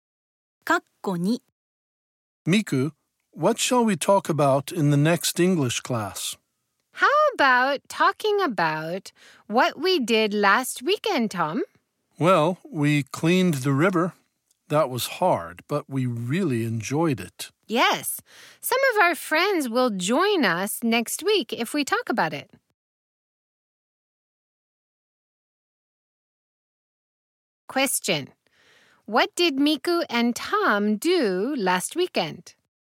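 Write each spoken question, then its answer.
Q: What did Miku and Tom do last weekend?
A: They cleaned the river.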